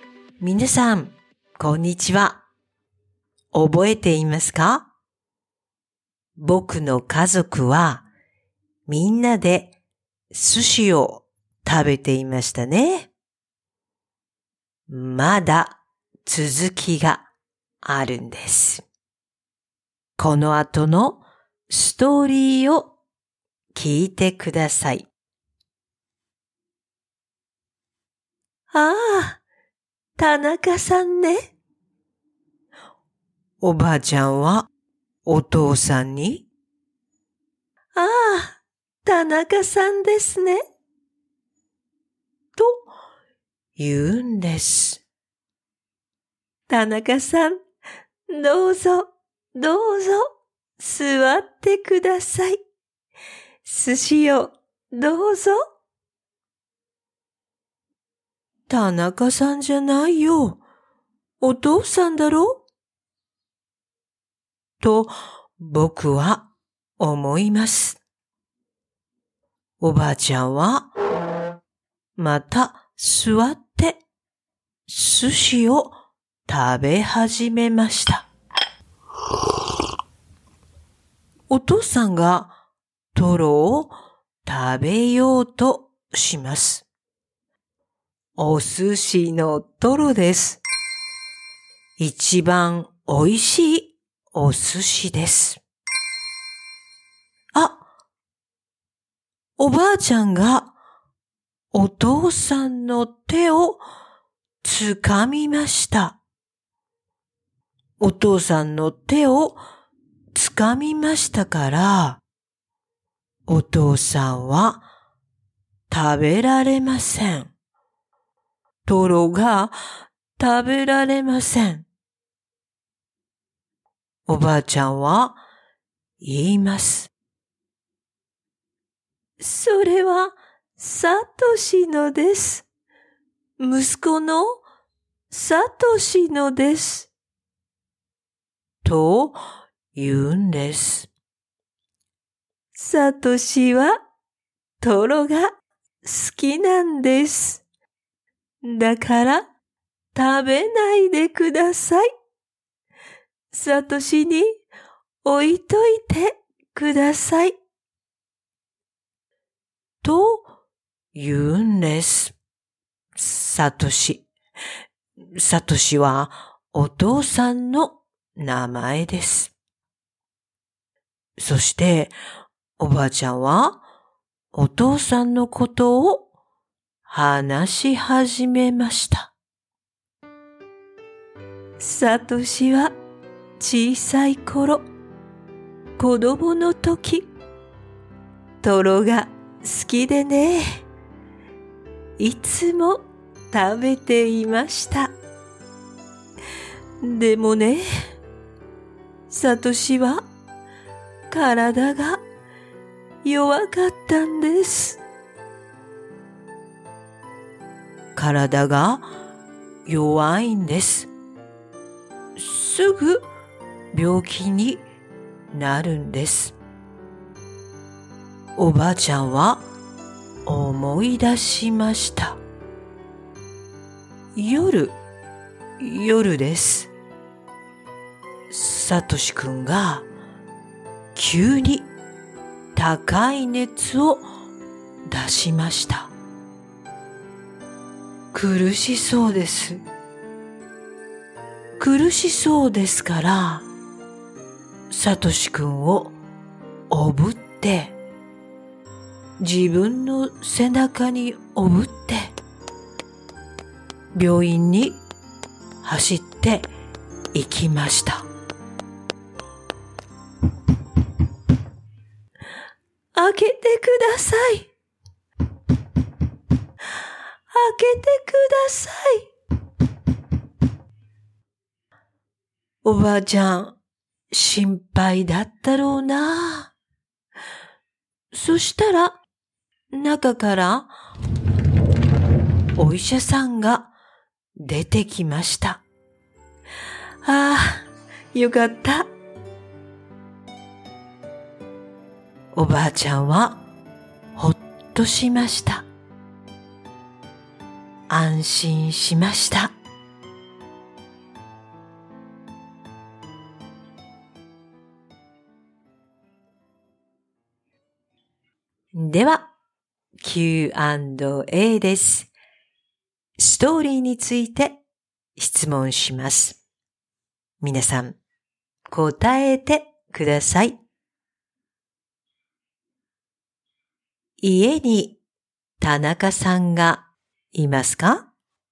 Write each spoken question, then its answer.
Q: 家に田中さんがいますか?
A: いいえ、いません。田中さんはいません。